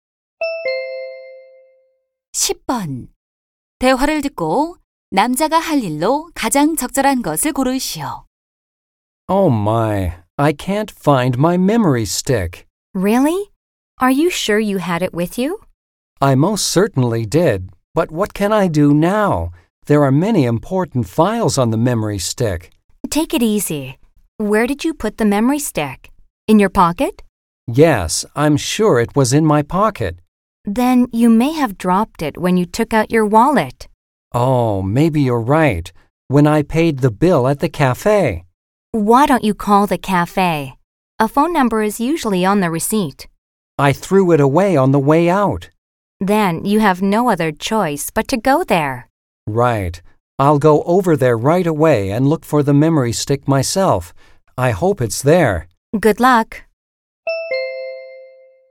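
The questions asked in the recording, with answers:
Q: 대화를 듣고 남자가 할 일로 가장 적절한 것을 고르시오.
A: 카페에 가서 메모리 스틱 찾기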